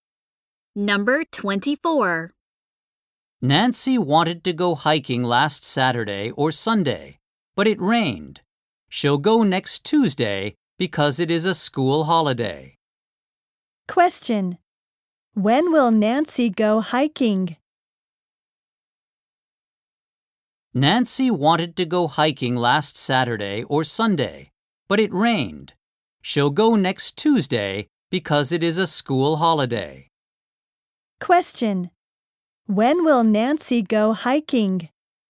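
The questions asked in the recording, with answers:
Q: When will Nancy go hiking?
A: Next Tuesday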